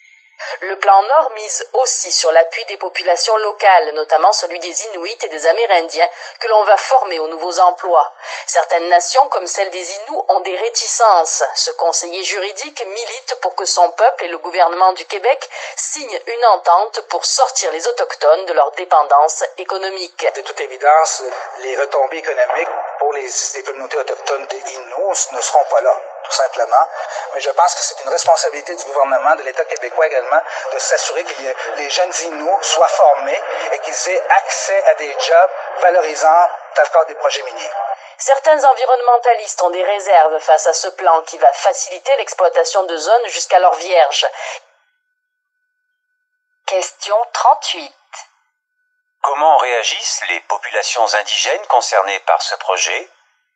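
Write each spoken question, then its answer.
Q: Comment réagissent les populations indigènes concernées par ce projet?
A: Certaines, comme les Inuits, ont des réticences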